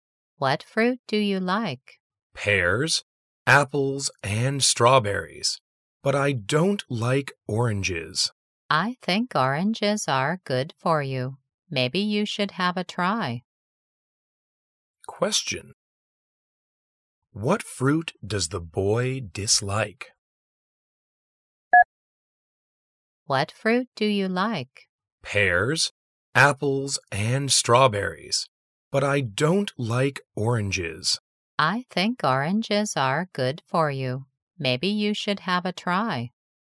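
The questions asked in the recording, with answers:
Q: What fruit does the boy dislike?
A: Oranges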